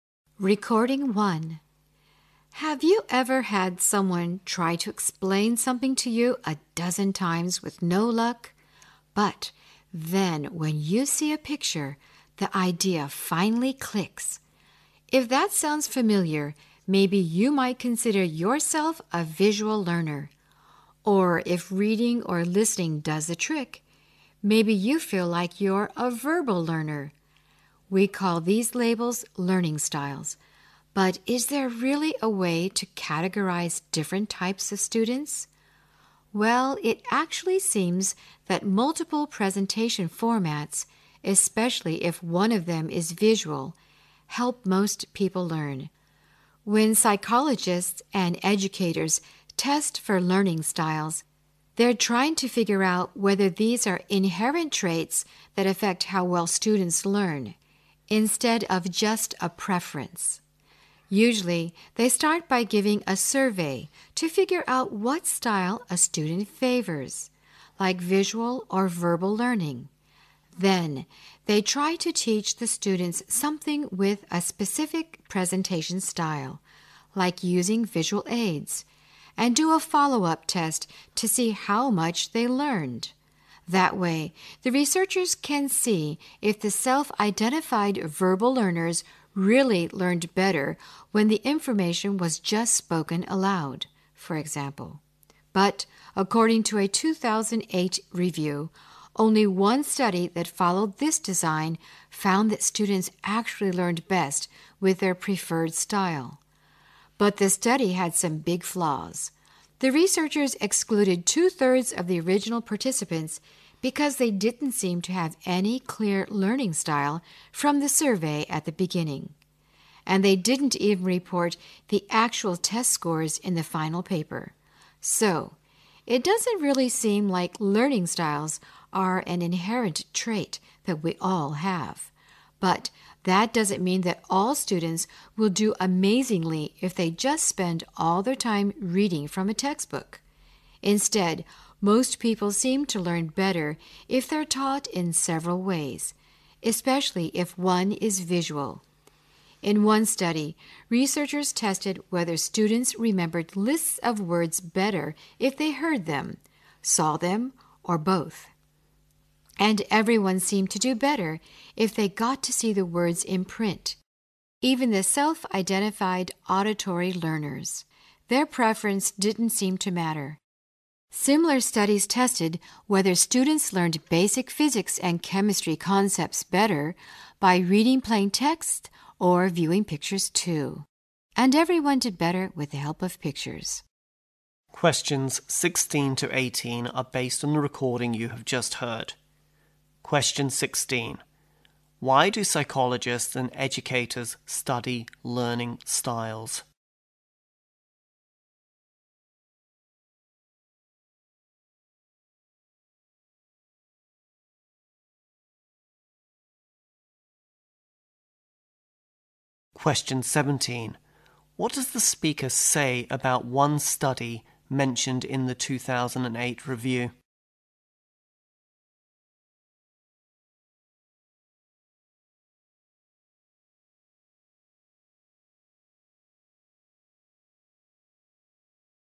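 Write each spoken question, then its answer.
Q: Why do psychologists and educators study learning styles?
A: To find out whether learning styles are inherent traits that affect how well students learn.

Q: What does the speaker say about one study mentioned in the 2008 review?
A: It had some big flaws.

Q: What message does the speaker want to convey about learning at the end of the talk?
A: People learn better when taught in several ways, especially with visuals.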